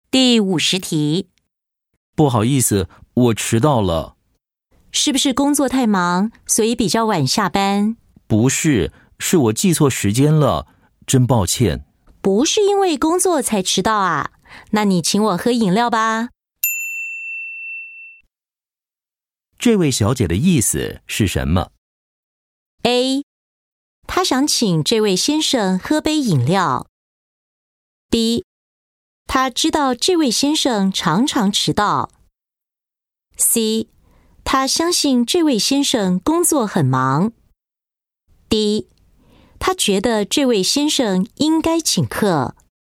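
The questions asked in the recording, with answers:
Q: 这位小姐的意思是什么?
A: D: 他觉得这位先生应该请客。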